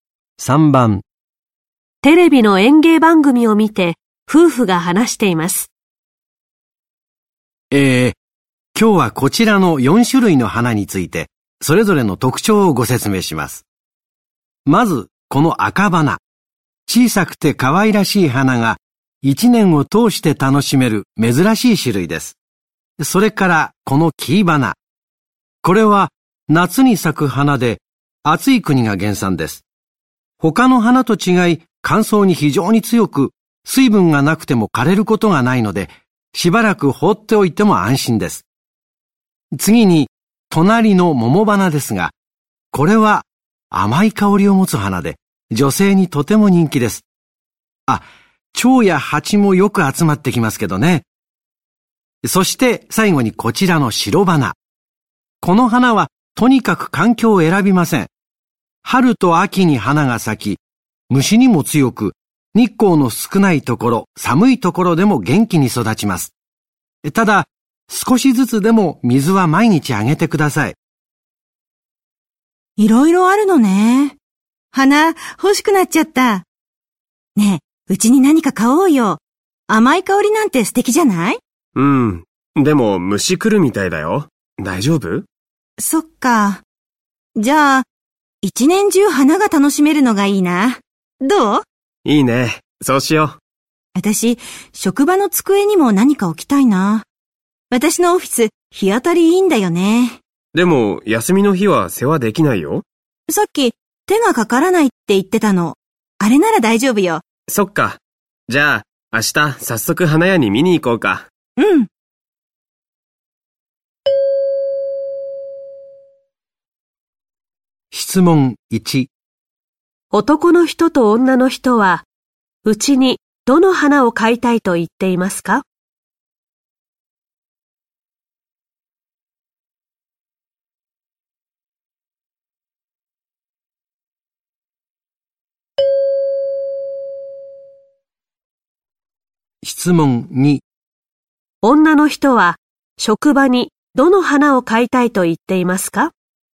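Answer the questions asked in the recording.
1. 赤花
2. 黄花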